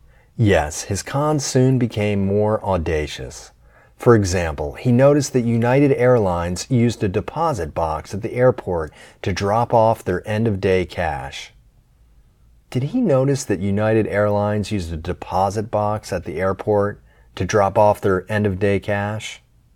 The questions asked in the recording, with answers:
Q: Did he notice that United Airlines used a deposit box at the airport to drop off their end-of-day cash?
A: Yes, he noticed that United Airlines used a deposit box at the airport to drop off their end-of-day cash.